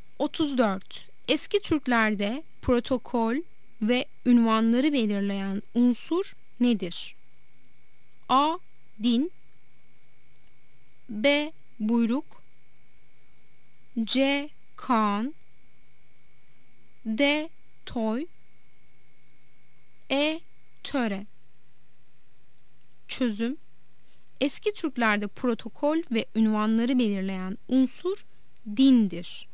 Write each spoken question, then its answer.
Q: Eski Türklerde protokol ve ünvanları belirleyen unsur nedir?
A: Yanıt A'dır. Din.